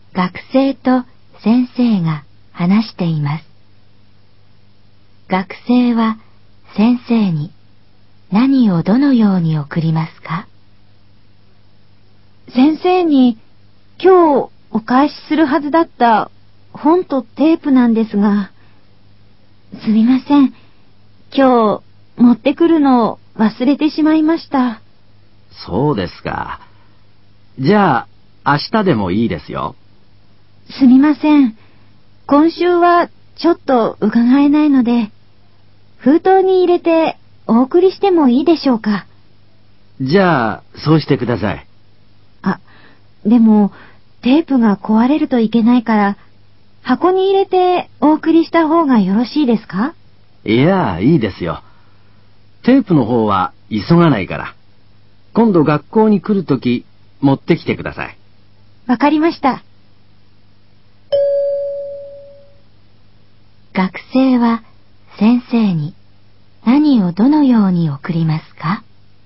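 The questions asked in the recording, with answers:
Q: 学生は先生に何をどのように送りますか?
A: 本を封筒に入れて送る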